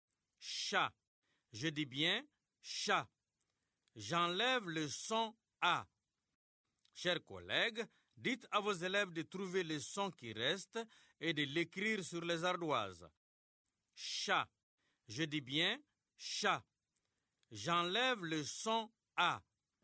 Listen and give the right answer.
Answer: C'est le son ch.